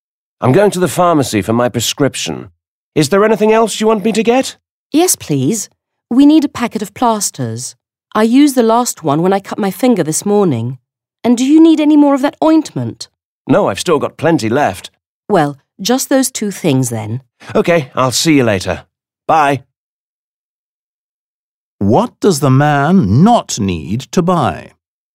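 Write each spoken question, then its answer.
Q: What does the man not need to buy?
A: ointment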